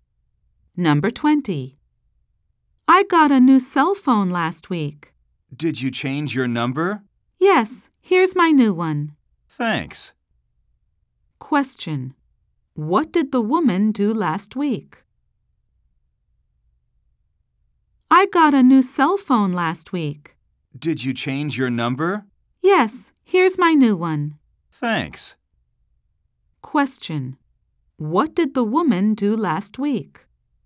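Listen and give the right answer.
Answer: She got a new cell phone.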